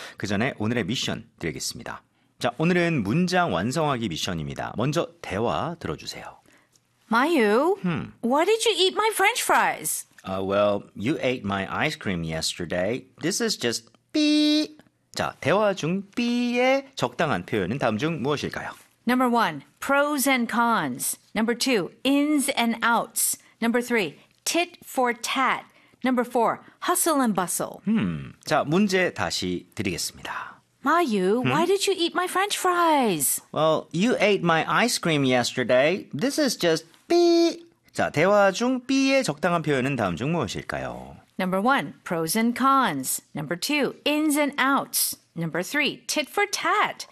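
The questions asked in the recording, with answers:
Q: 자, 대화 중 삐의 적당한 표현은 다음 중 무엇일까요?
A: 3: tit for tat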